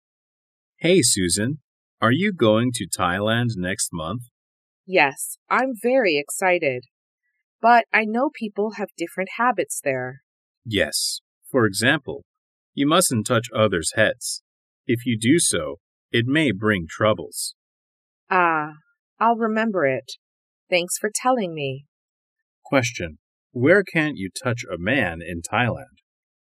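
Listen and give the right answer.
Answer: On his head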